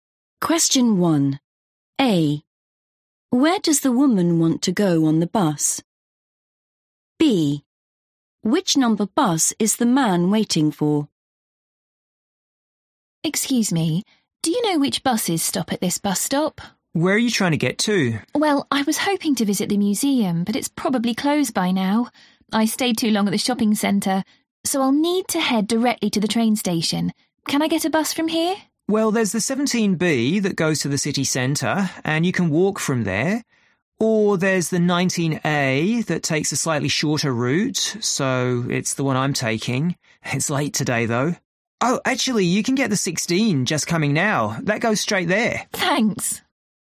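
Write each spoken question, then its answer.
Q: Where does the woman want to go on the bus?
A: the train station

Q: Which number bus is the man waiting for?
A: 19A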